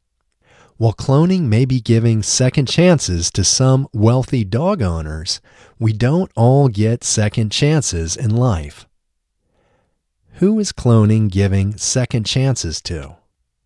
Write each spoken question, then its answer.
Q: Who is cloning giving second chances to?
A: Cloning is giving second chances to wealthy dog owners.